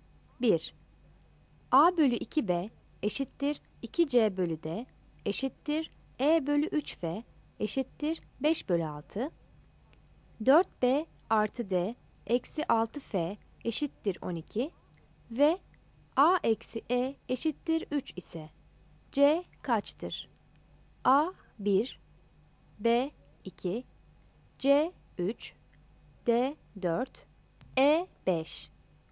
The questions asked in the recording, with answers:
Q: 4B artı D eksi 6F eşittir 12 ve A eksi E eşittir 3 ise C kaçtır?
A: Yanıt B'dir.